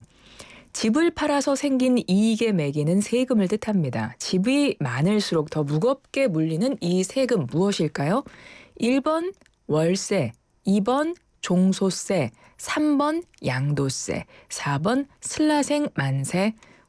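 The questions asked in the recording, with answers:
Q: 집이 많을수록 더 무겁게 물리는 이 세금 무엇일까요?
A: 3번: 양도세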